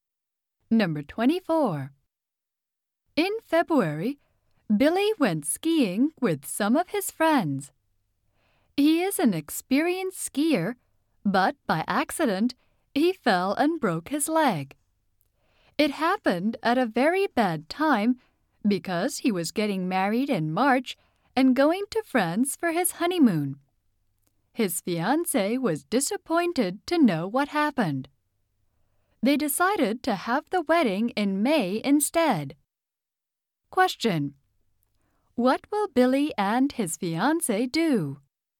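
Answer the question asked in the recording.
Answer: Have the wedding in May.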